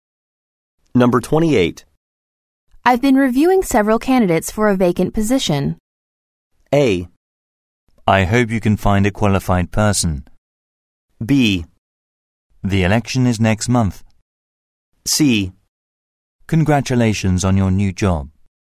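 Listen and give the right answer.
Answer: A: I hope you can find a qualified person.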